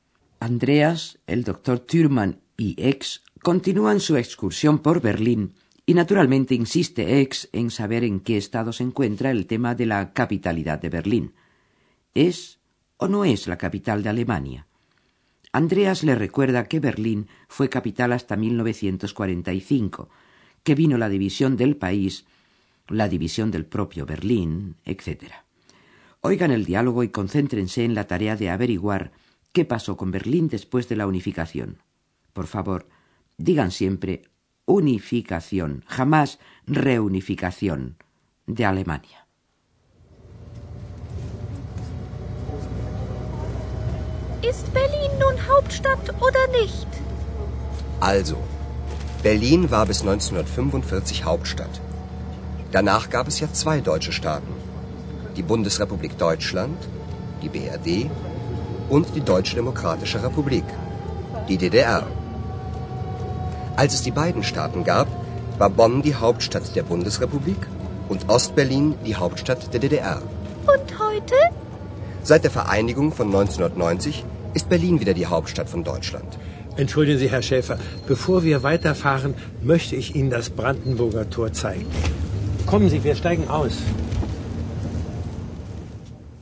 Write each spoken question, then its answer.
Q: Oigan el diálogo y concéntrense en la tarea de averiguar qué pasó con Berlín después de la unificación.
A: Desde la unificación en 1990 de ambos estados alemanes, Berlín ha vuelto a ser la capital de toda Alemania.